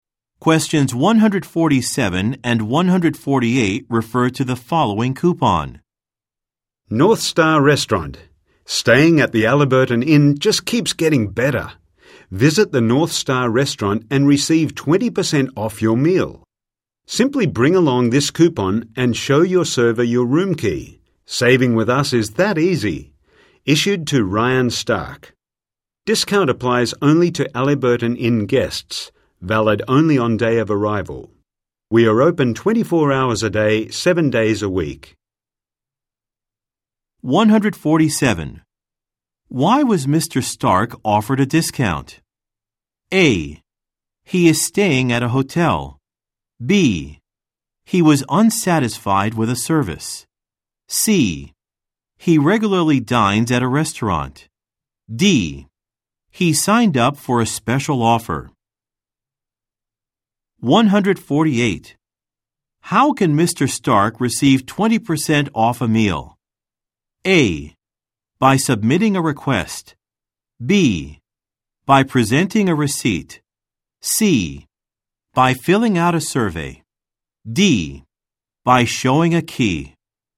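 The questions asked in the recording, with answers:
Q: Why was Mr. Stark offered a discount?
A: A: He is staying at a hotel.

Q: How can Mr. Stark receive 20% off a meal?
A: D: By showing a key.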